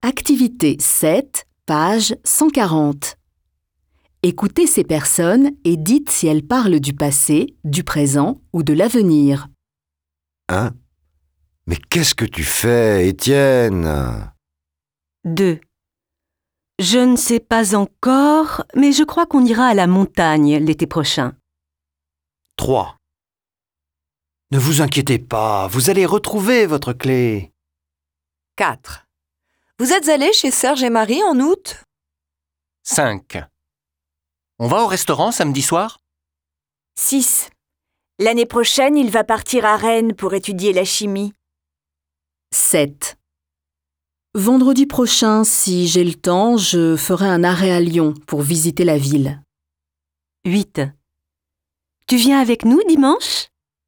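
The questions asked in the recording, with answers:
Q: Mais qu'est-ce que tu fais, Étienne ?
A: présent

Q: Je ne sais pas encore, mais je crois qu'on ira à la montagne l'été prochain.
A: avenir

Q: Ne vous inquiétez pas, vous allez retrouver votre clé.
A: avenir

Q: Vous êtes allé chez Serge et Marie en août ?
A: passé

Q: L'année prochaine, il va partir à Rennes pour étudier la chimie.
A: avenir

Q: Vendredi prochain, si j'ai le temps, je ferai un arrêt à Lyon pour visiter la ville.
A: avenir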